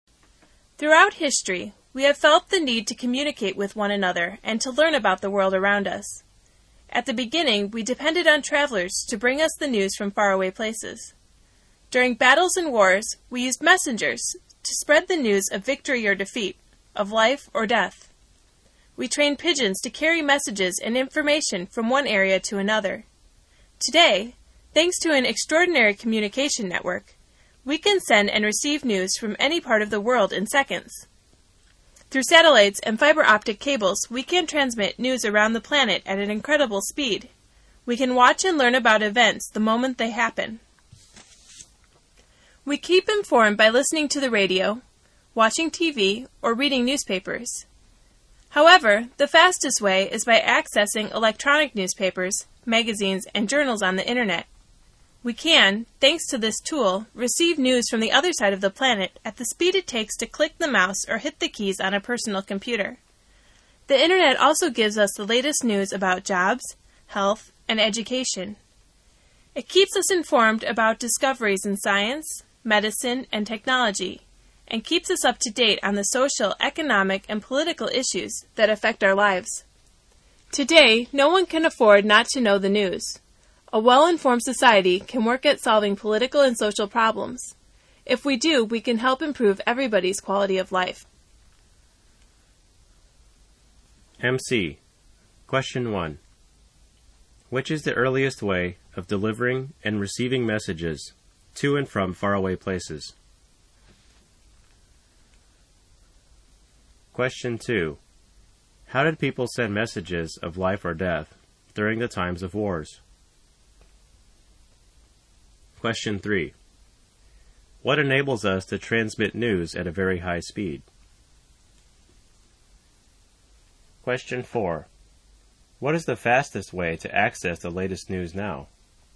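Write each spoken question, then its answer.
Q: Which is the earliest way of delivering and receiving messages to and from faraway places?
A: Travelers brought the news

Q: How did people send messages of life or death during the times of wars?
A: By messengers

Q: What enables us to transmit news at a very high speed?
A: Satellites and fiber optic cables

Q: What is the fastest way to access the latest news now?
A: Accessing electronic newspapers, magazines and journals on the internet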